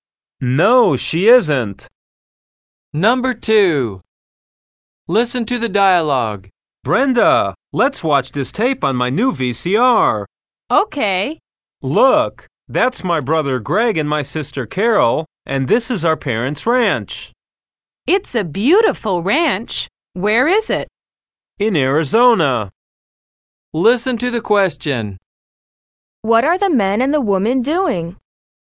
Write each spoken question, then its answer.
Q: What are the man and the woman doing?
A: They're watching a home video.